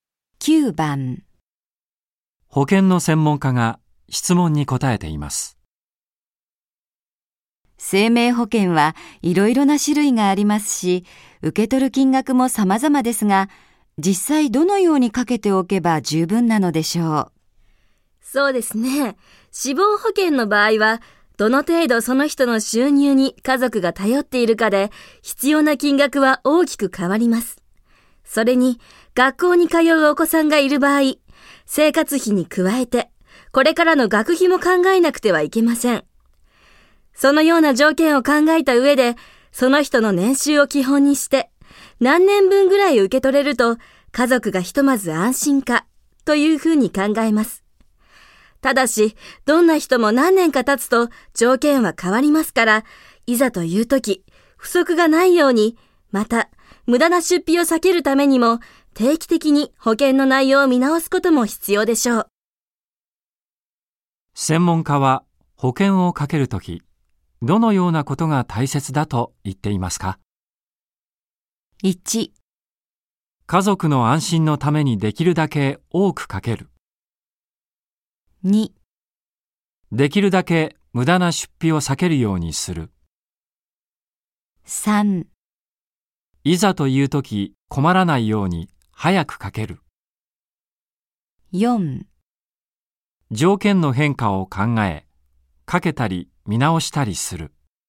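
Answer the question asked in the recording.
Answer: 4: 条件の変化を考え、かけたり見直したりする。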